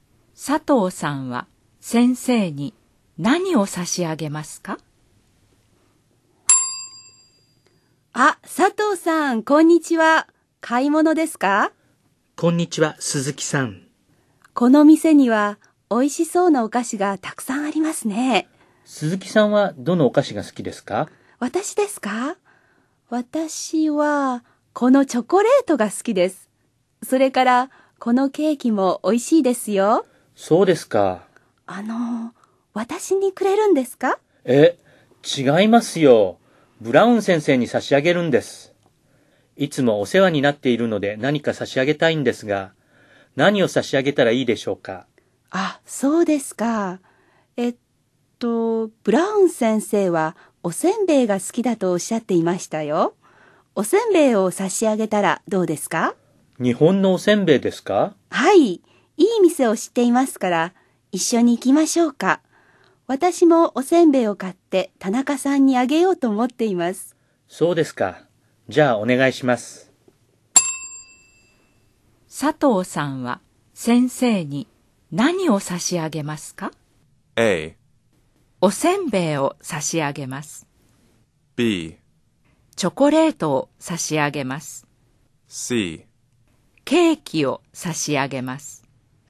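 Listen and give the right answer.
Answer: A: おせんべいを差し上げます。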